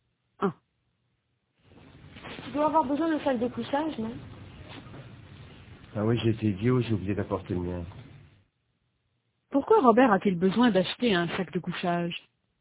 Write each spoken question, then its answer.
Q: Pourquoi Robert a-t-il besoin d'acheter un sac de couchage?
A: Parce qu'il n'a pas apporté le sien.